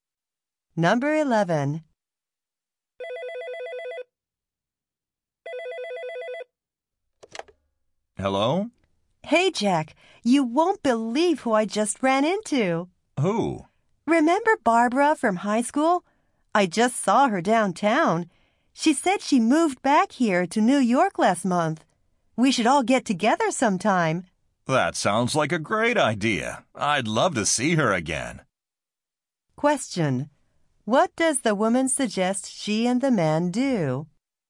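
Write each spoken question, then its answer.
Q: What does the woman suggest she and the man do?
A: Get together with Barbara sometime.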